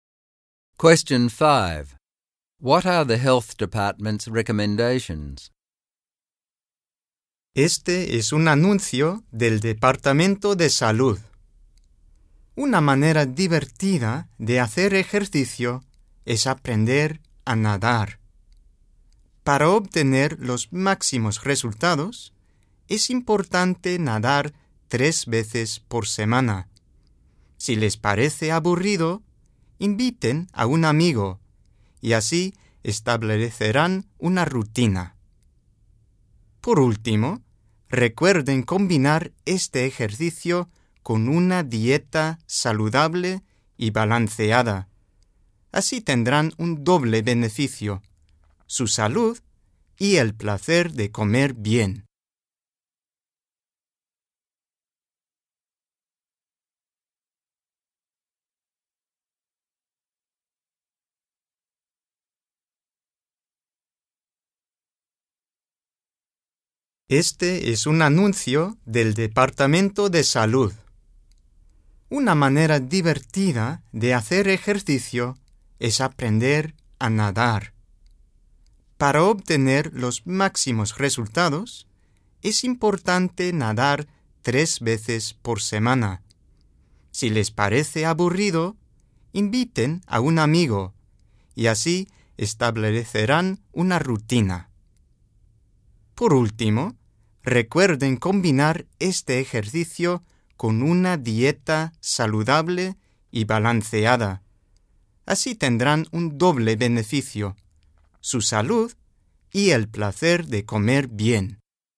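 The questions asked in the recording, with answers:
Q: What are the health department's recommendations?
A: Learn to swim, swim 3 times a week, invite a friend to make it a routine, and combine it with a healthy, balanced diet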